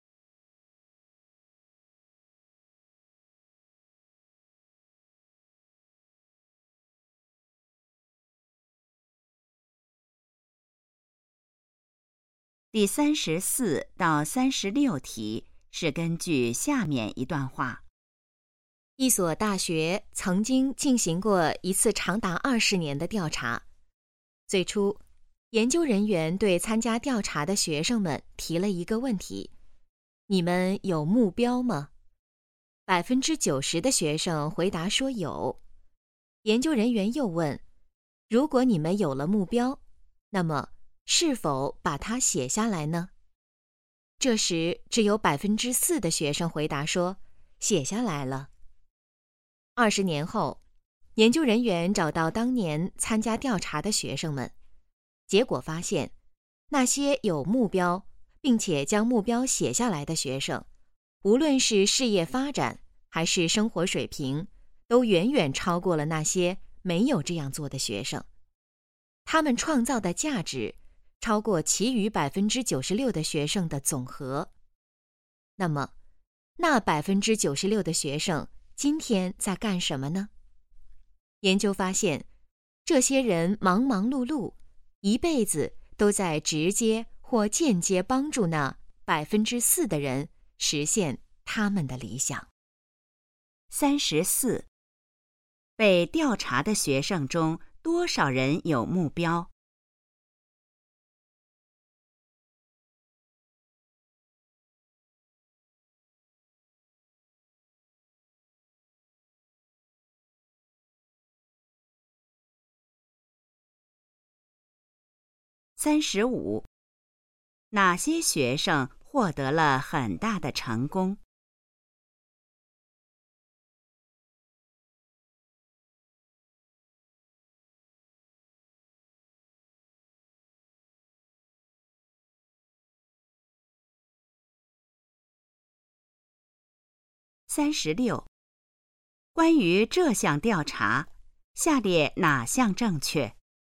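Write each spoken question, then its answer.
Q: 被调查的学生中多少人有目标?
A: 90%

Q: 哪些学生获得了很大的成功?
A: 有目标并且把目标写下来的学生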